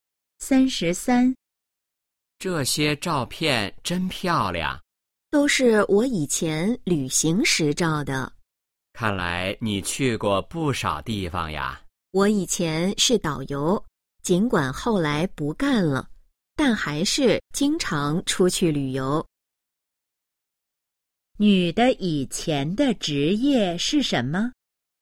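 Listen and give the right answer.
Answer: 导游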